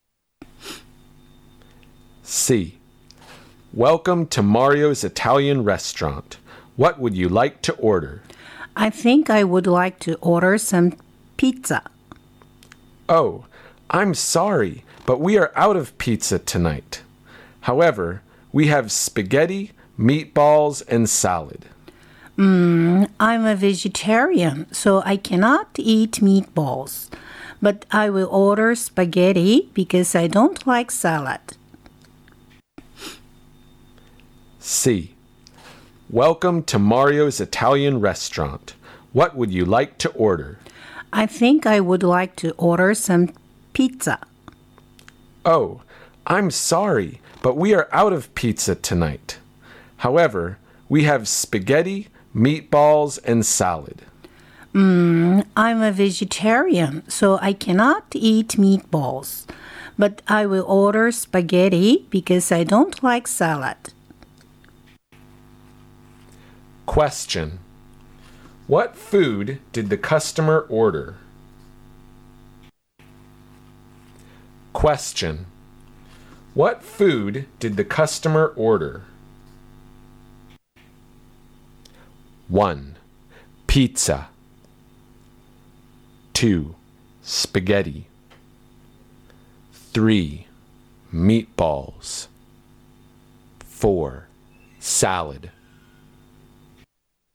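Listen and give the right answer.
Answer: 2: Spaghetti.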